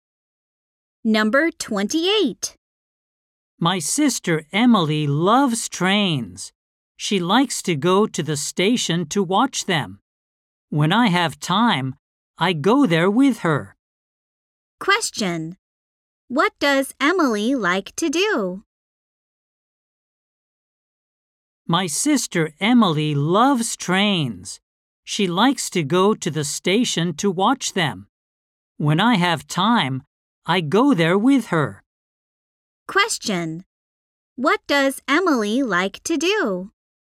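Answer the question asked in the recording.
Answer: Go to the station to watch trains.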